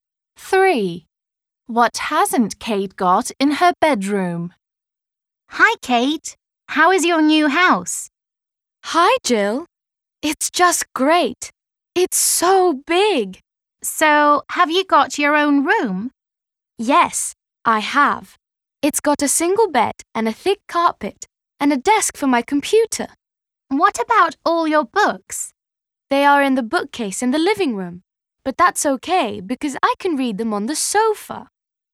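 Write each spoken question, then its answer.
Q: What hasn't Kate got in her bedroom?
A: A bookcase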